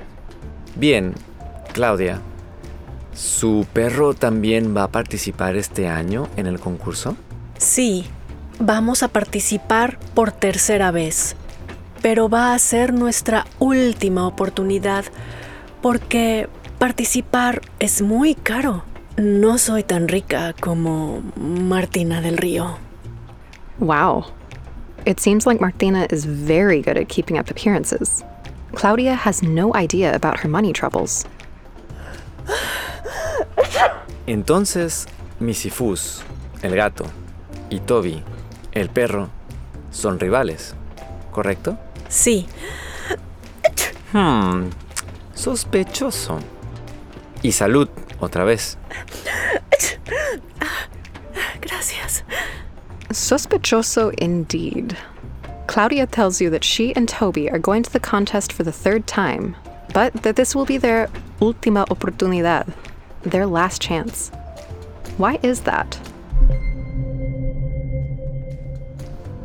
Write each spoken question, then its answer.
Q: Their last chance. Why is that?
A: Sí, porque participar es muy caro.